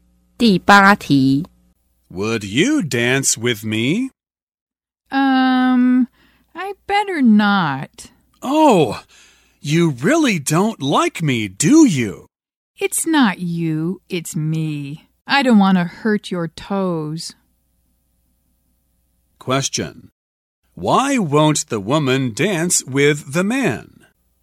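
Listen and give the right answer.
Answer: She doesn't want to hurt his toes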